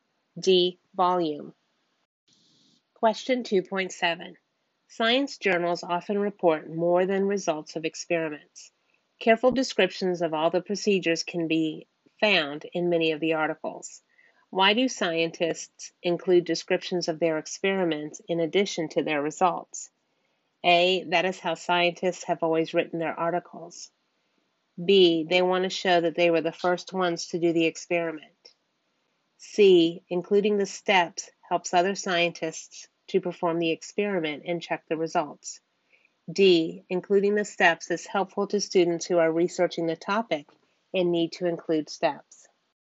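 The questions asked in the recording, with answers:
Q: Why do scientists include descriptions of their experiments in addition to their results?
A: C: Including the steps helps other scientists to perform the experiment and check the results.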